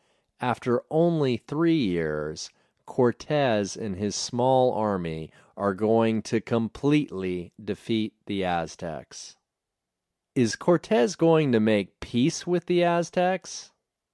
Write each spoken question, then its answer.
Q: Is Cortez going to make peace with the Aztecs?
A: No, he isn't going to make peace with the Aztecs.